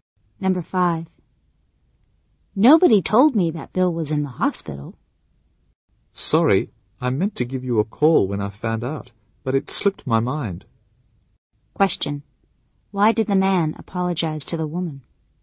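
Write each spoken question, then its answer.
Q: Why did the man apologize to the woman?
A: He forgot to call and tell her that Bill was in the hospital.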